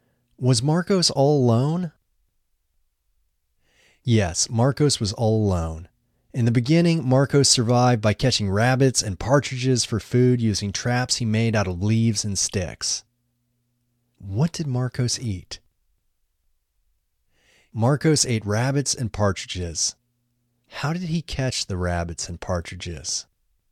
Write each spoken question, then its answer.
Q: How did he catch the rabbits and partridges?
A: He caught them using traps he made out of leaves and sticks.